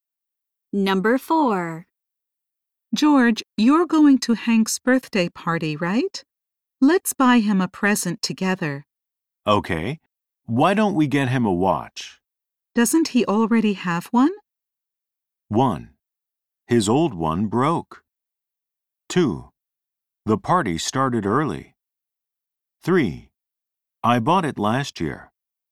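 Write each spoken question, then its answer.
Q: Doesn't he already have one?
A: 1: His old one broke.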